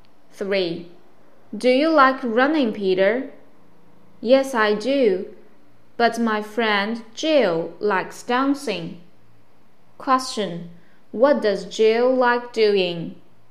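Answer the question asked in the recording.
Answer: Dancing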